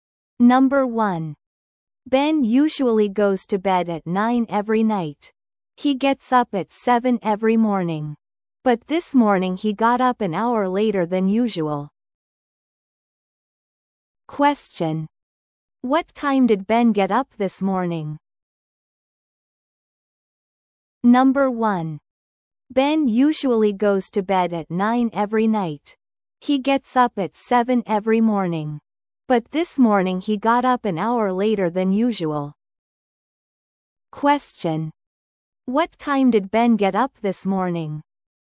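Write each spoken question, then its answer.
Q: What time did Ben get up this morning?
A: At 8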